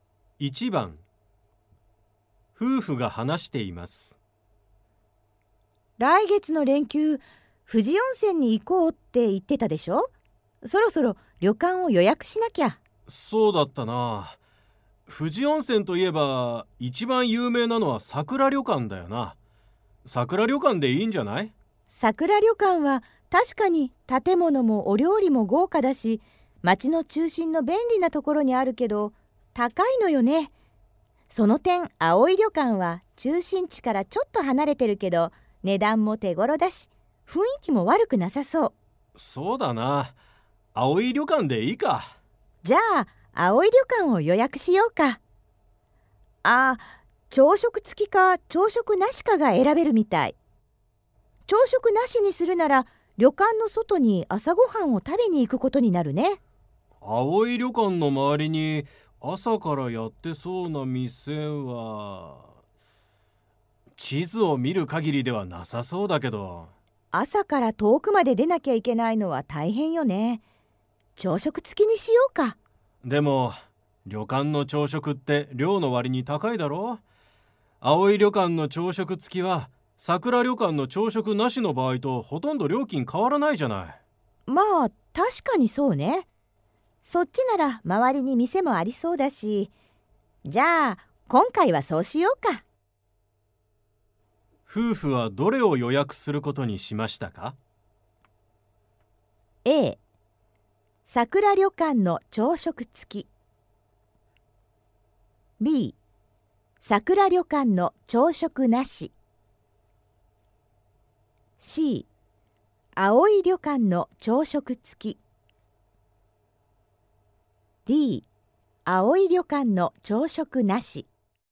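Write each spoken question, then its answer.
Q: 夫婦はどれを予約することにしましたか?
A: B: 桜旅館の朝食なし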